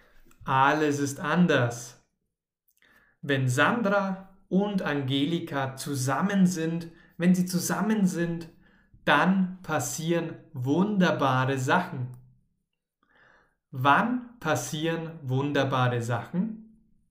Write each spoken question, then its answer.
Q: Wann passieren wunderbare Sachen?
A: wenn Sandro und Angelika zusammen sind.